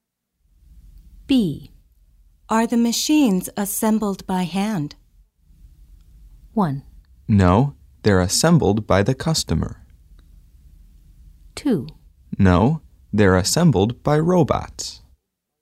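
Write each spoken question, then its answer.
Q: Are the machines assembled by hand?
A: 2: No, they're assembled by robots.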